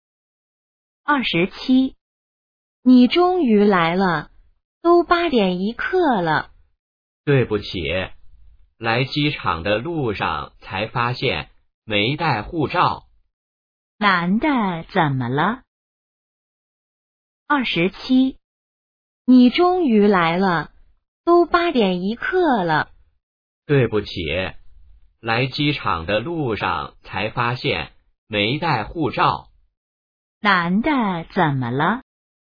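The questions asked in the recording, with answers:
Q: 男的怎么了?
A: 没带护照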